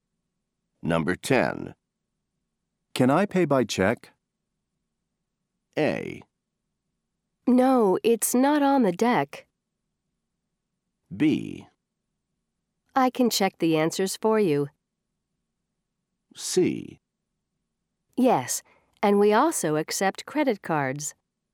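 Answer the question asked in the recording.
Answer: C: Yes, and we also accept credit cards.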